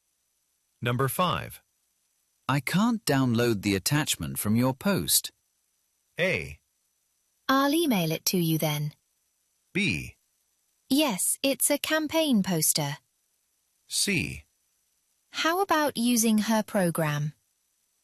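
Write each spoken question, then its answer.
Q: I can't download the attachment from your post.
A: A: I'll email it to you then.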